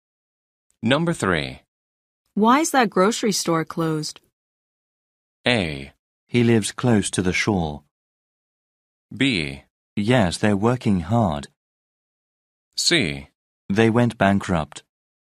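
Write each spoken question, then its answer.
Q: Why is that grocery store closed?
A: C: They went bankrupt.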